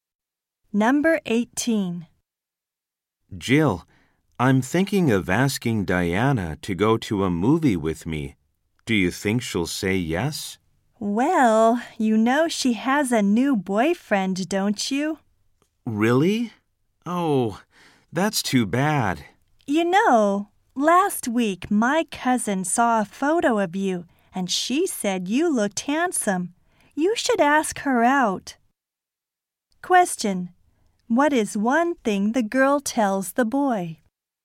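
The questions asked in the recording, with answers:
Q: What is one thing the girl tells the boy?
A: Diana has a new boyfriend.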